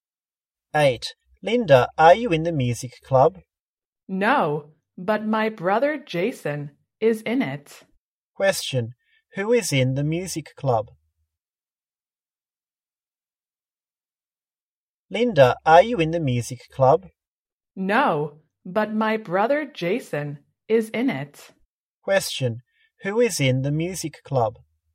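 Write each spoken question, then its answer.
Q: who is in the music club?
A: Linda's brother Jason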